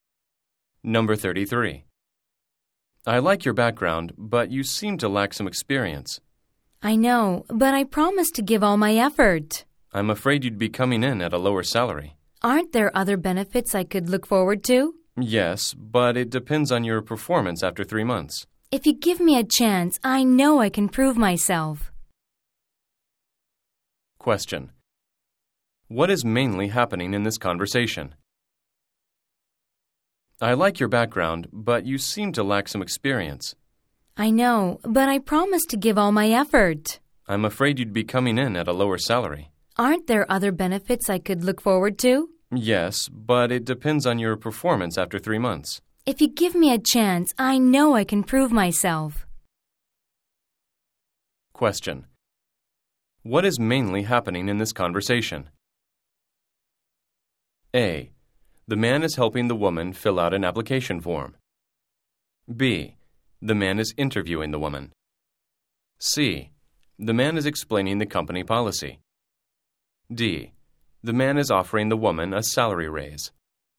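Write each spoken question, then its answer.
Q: What is mainly happening in this conversation?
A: B: The man is interviewing the woman.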